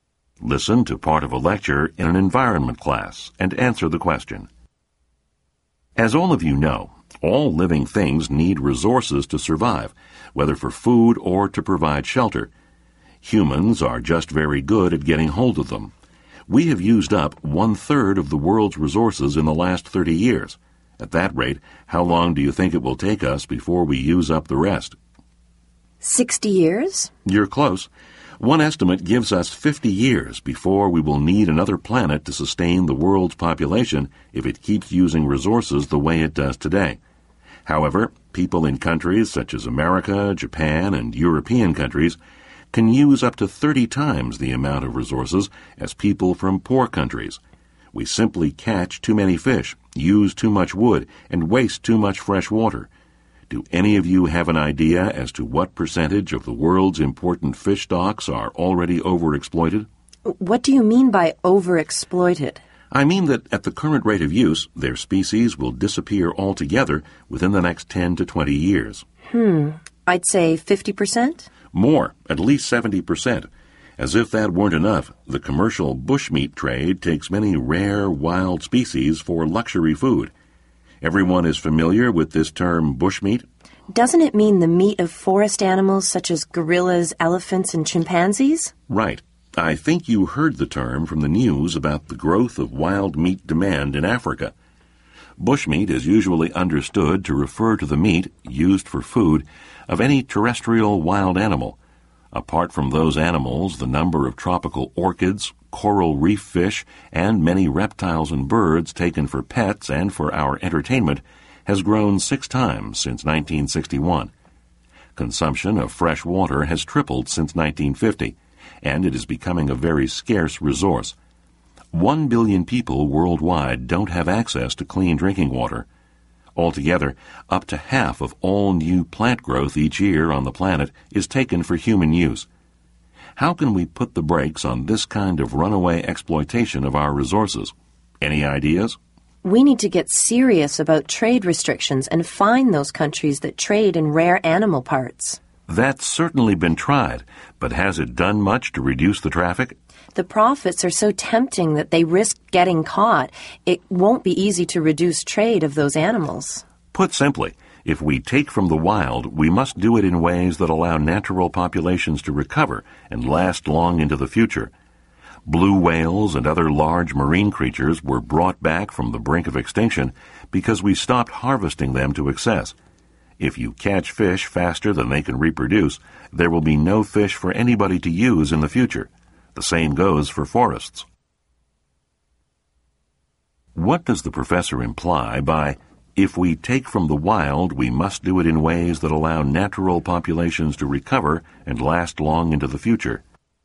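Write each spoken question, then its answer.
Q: What does the professor imply by, if we take from the wild, we must do it in ways that allow natural populations to recover and last long into the future?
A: We should use wild resources sustainably and not take them faster than they can reproduce and recover.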